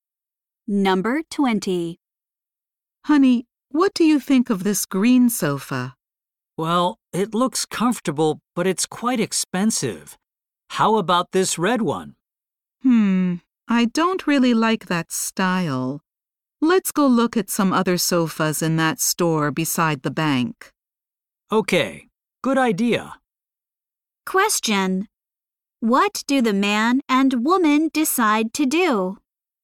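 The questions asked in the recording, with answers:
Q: What do the man and woman decide to do?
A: Go look at sofas in another store beside the bank.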